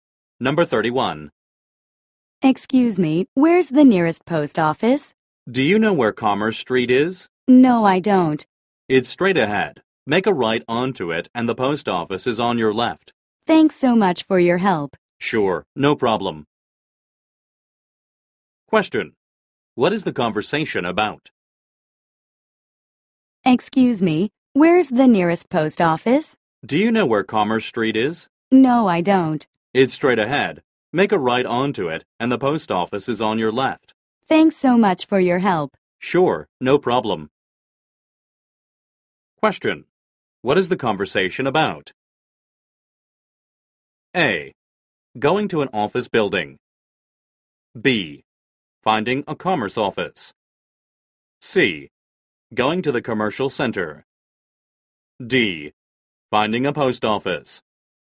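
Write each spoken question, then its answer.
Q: What is the conversation about?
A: D: Finding a post office.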